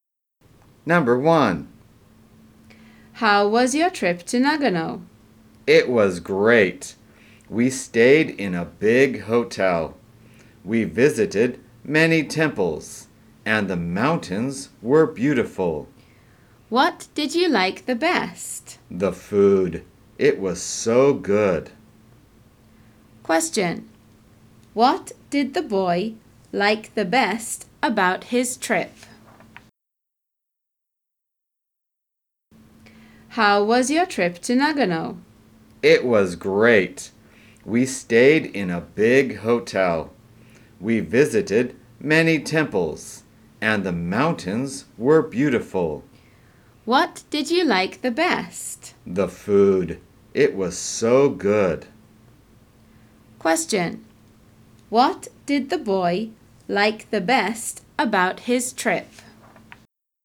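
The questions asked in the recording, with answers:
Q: What did the boy like the best about his trip?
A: The food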